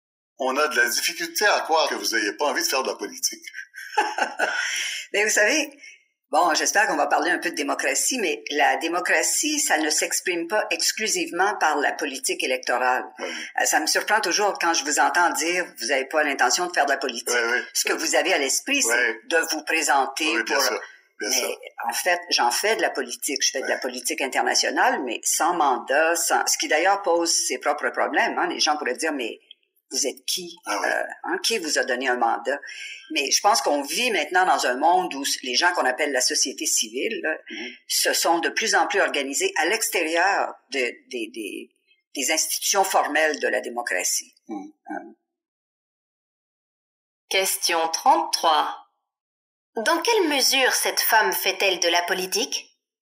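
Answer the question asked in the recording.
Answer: Elle fait de la politique internationale, mais sans mandat électoral, en dehors des institutions formelles (via la société civile).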